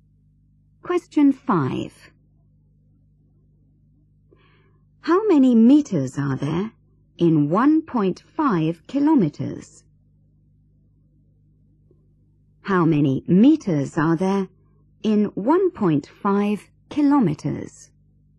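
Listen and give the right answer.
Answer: 1500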